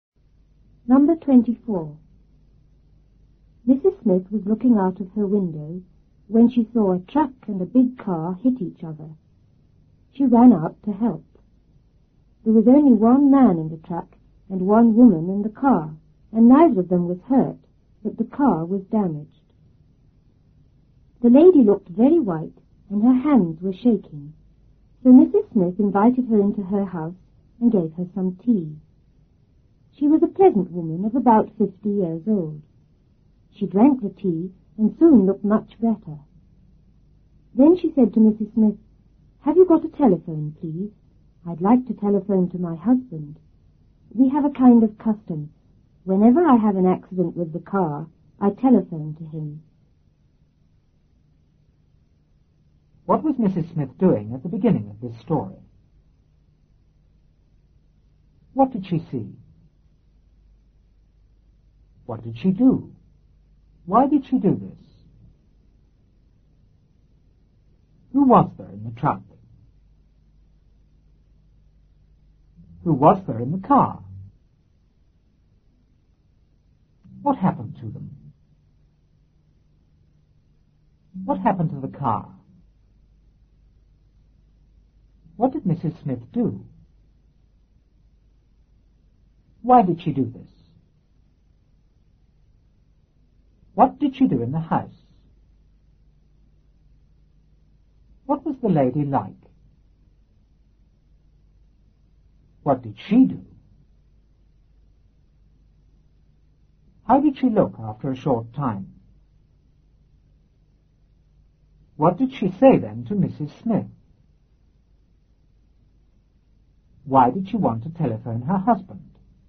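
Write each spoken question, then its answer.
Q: What was Mrs. Smith doing at the beginning of this story?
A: Looking out of her window

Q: What did she see?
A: A truck and a big car hit each other

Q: What did she do?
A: She ran out to help

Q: Who was there in the truck?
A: Only one man

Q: Who was there in the car?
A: One woman

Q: What happened to them?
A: Neither of them was hurt

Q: What happened to the car?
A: It was damaged

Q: What did Mrs. Smith do?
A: She invited the lady into her house

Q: Why did she do this?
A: The lady looked very white and her hands were shaking

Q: What did she do in the house?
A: Gave her some tea

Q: What was the lady like?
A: A pleasant woman of about 50

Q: What did she do?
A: She drank the tea

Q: How did she look after a short time?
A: Much better

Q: Why did she want to telephone her husband?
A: It was their custom to phone him whenever she had a car accident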